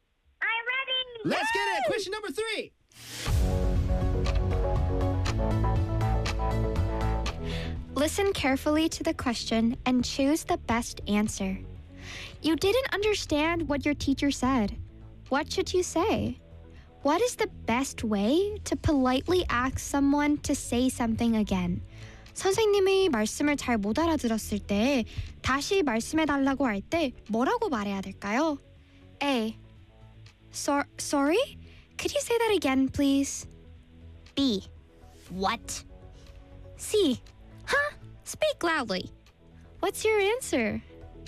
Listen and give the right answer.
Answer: 맞췄어요.